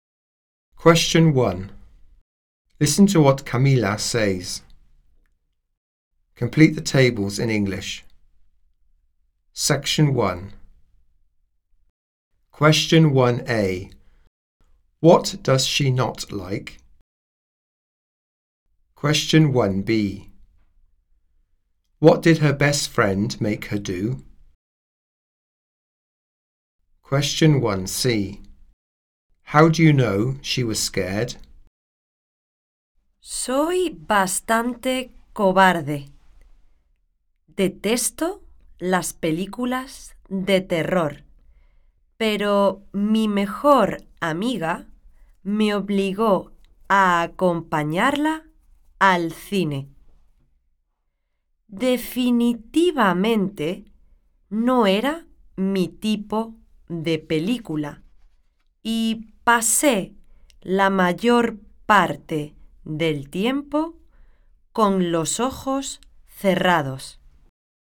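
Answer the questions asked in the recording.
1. Horror films
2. Go with her to the cinema
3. She spent most of the film with her eyes closed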